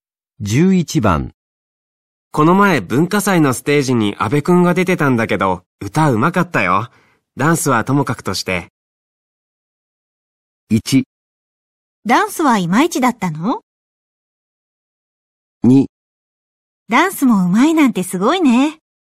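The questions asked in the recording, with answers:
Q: この前文化祭のステージに阿部くんが出てたんだけど、歌うまかったよ。 ダンスはともかくとして。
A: 1: ダンスはいまいちだったの?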